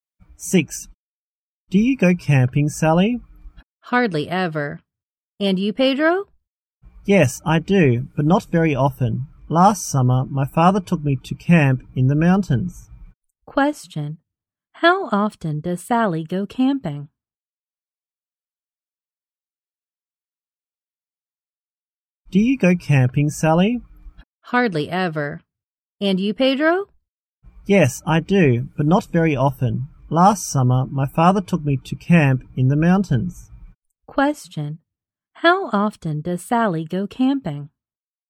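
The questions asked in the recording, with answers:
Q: How often does Sally go camping?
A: Hardly ever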